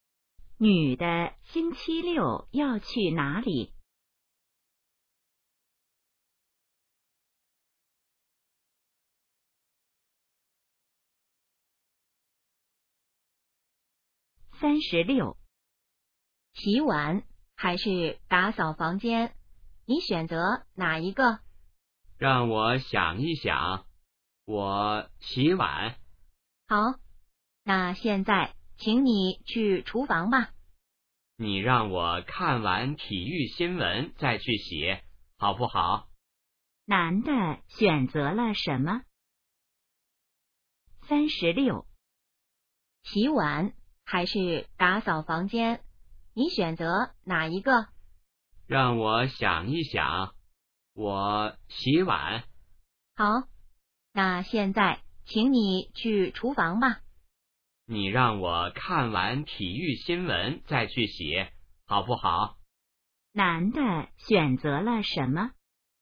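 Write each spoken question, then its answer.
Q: 男的选择了什么?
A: 洗碗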